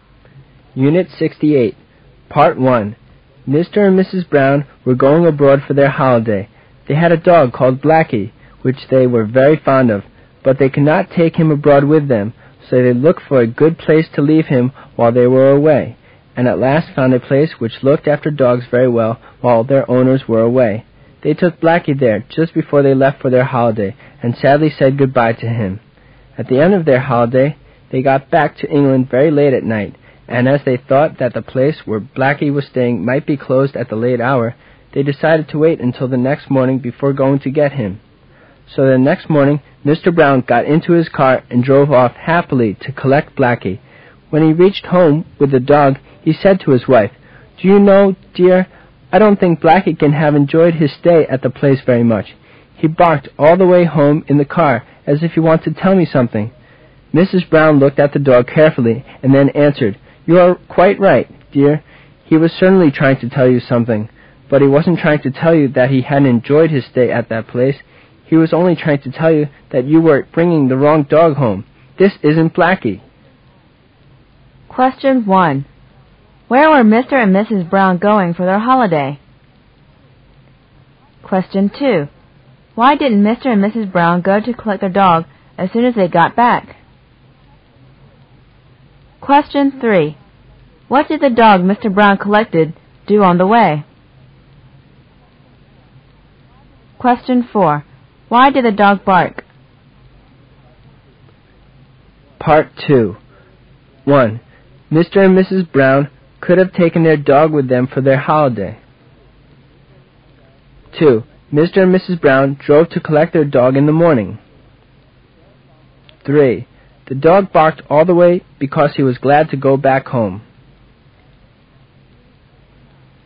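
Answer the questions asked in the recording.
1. Abroad
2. They got back late at night and thought the place might be closed
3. It barked all the way home
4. Mr. Brown was bringing the wrong dog home
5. False
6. False
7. False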